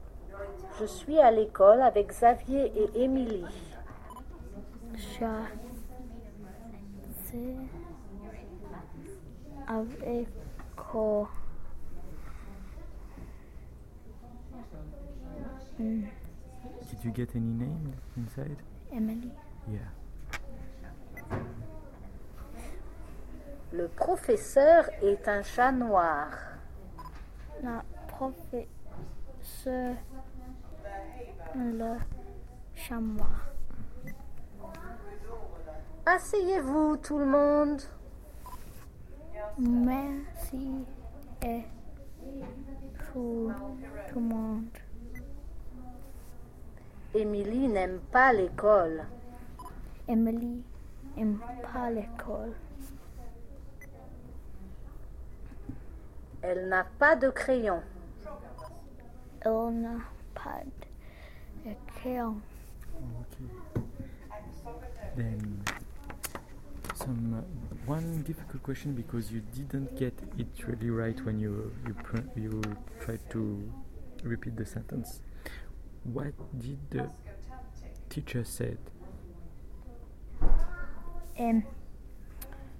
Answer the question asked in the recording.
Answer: In fact, he said, asseyez-vous.